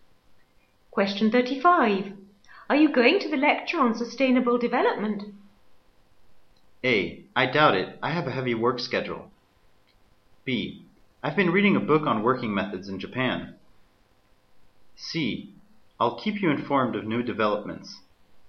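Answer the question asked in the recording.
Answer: A: I doubt it. I have a heavy work schedule.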